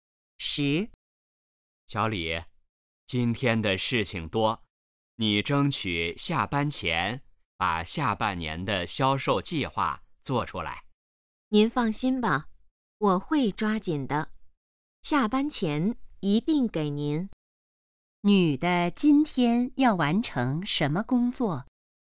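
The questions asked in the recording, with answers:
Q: 女的今天要完成什么工作?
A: 下半年的销售计划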